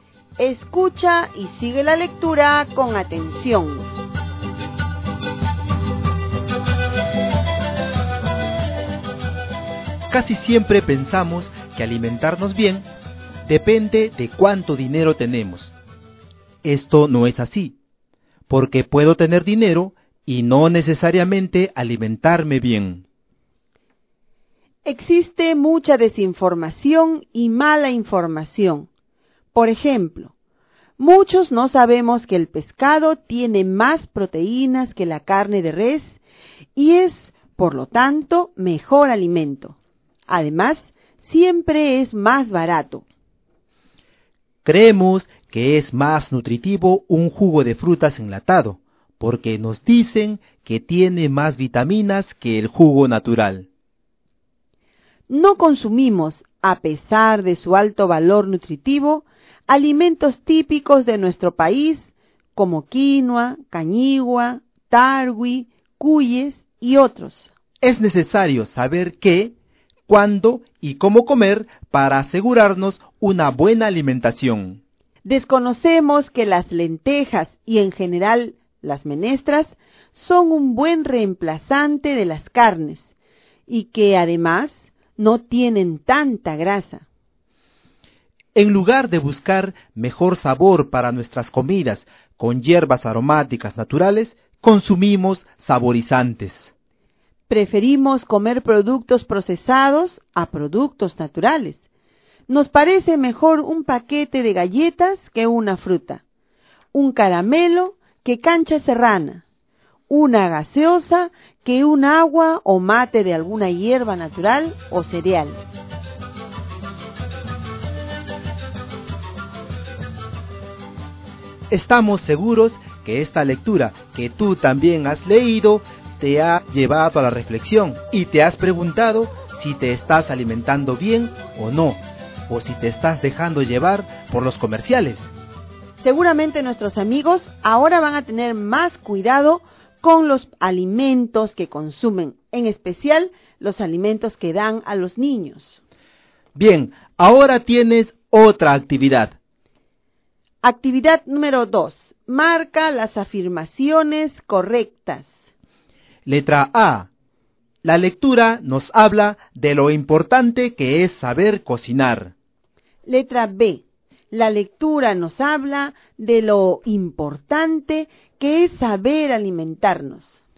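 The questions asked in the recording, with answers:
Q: Marca las afirmaciones correctas.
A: B: La lectura nos habla de lo importante que es saber alimentarnos.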